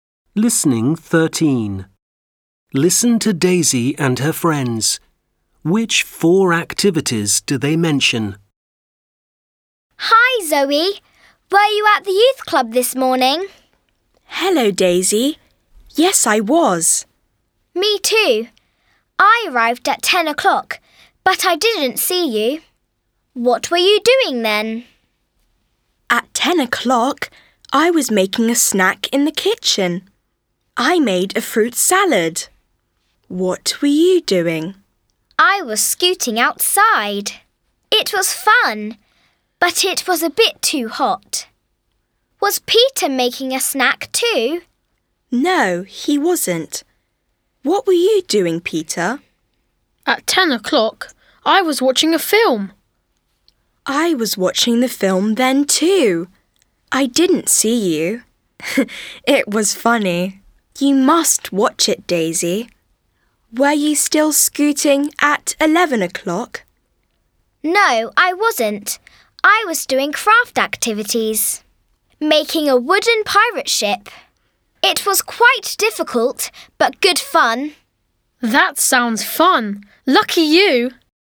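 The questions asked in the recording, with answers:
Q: Which four activities do they mention?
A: Making a snack (fruit salad), scooting, watching a film, and doing craft activities (making a wooden pirate ship)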